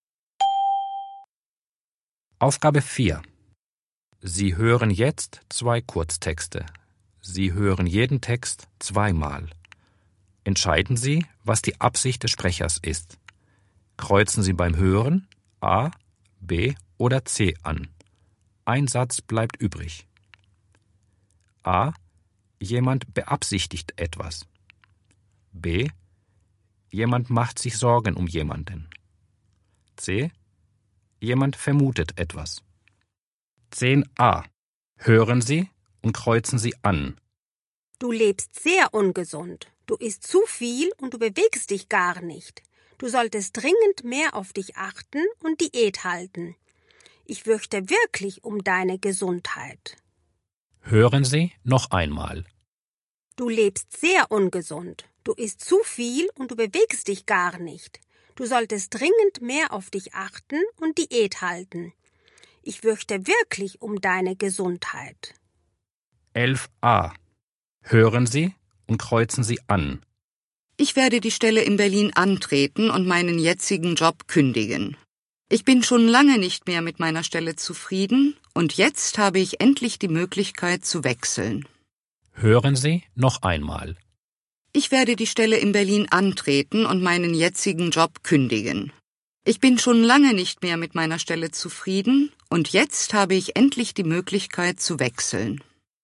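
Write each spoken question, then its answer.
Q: Entscheiden Sie, was die Absicht des Sprechers ist.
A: B: Jemand macht sich Sorgen um jemanden.

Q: Entscheiden Sie, was die Absicht des Sprechers ist.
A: A: Jemand beabsichtigt etwas.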